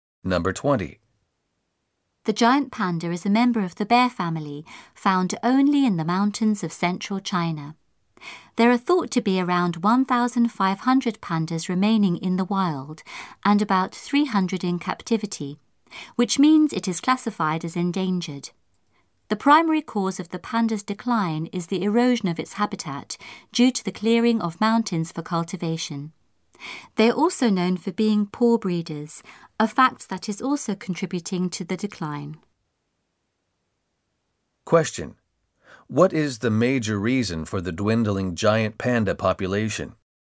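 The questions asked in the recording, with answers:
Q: What is the major reason for the dwindling giant panda population?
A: The erosion of its habitat due to the clearing of mountains for cultivation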